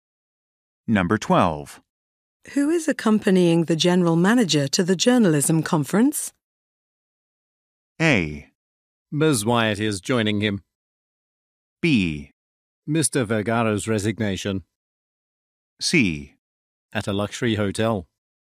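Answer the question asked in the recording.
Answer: A: Ms. Wyatt is joining him.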